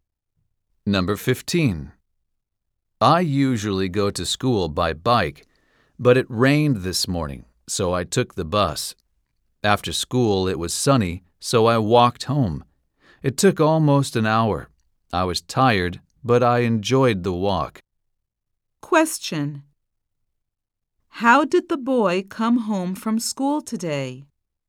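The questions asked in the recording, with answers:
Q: How did the boy come home from school today?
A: He walked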